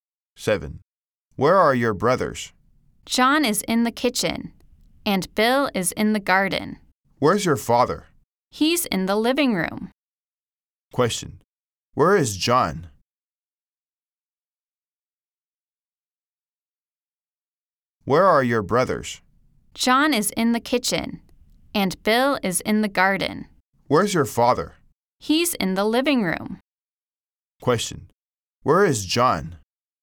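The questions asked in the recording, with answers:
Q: Where is John?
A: In the kitchen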